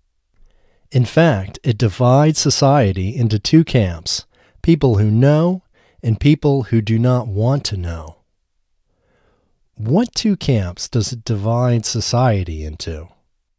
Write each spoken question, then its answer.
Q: What two camps does it divide society into?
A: It divides society into people who know and people who do not want to know.